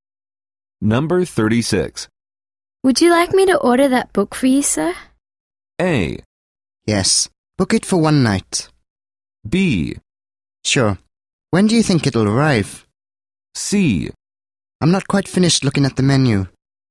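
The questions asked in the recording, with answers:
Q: Would you like me to order that book for you, sir?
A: B: Sure. When do you think it'll arrive?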